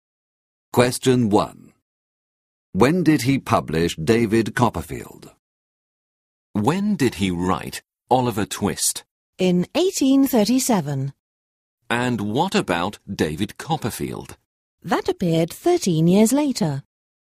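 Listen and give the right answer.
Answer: 1850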